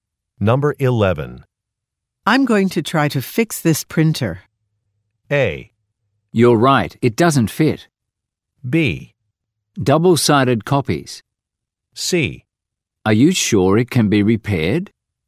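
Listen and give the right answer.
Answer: C: Are you sure it can be repaired?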